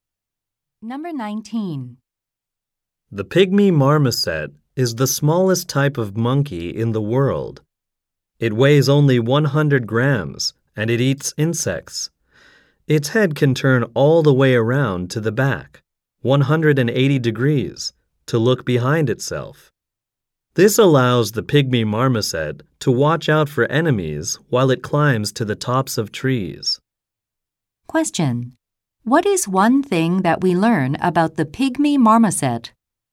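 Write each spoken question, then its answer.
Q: What is one thing that we learn about the pygmy marmoset?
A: It can turn its head 180 degrees to look behind itself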